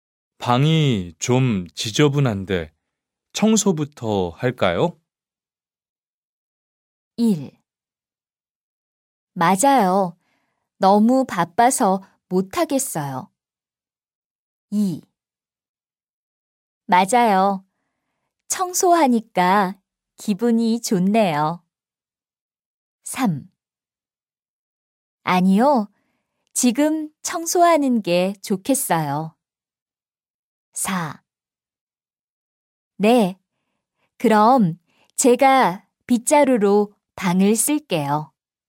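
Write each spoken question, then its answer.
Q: 방이 좀 지저분한데 청소부터 할까요?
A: 4: 네. 그럼 제가 빗자루로 방을 쓸게요.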